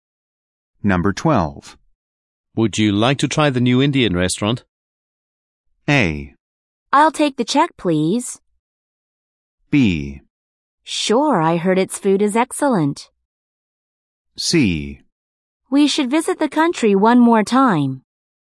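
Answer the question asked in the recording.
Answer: B: Sure, I heard its food is excellent.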